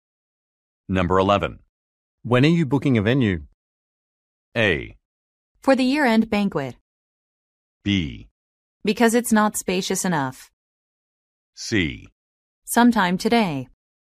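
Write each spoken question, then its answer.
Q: When are you booking a venue?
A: C: Sometime today.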